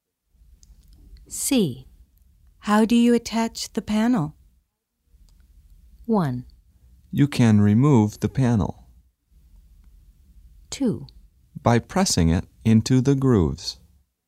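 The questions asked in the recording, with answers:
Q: How do you attach the panel?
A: 2: By pressing it into the grooves.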